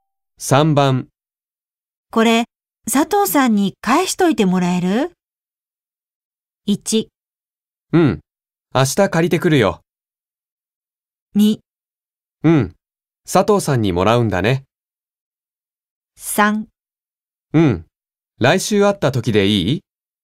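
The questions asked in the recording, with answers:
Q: これ佐藤さんに返しといてもらえる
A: 3: うん、来週会った時でいい?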